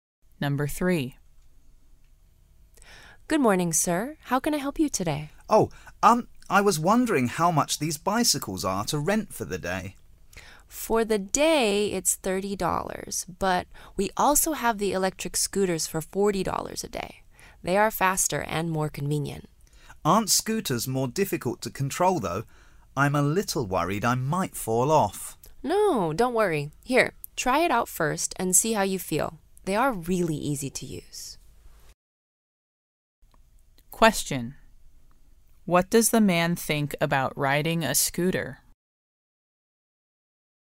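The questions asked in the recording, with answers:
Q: What does the man think about riding a scooter?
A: He thinks it may be difficult to control and worries he might fall off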